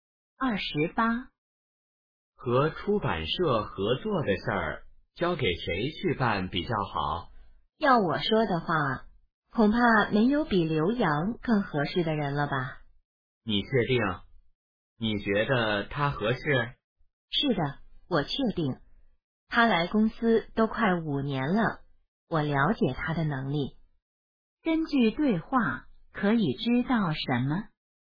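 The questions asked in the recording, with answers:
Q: 根据对话可以知道什么?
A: 说话人认为刘洋最适合负责和出版社合作的事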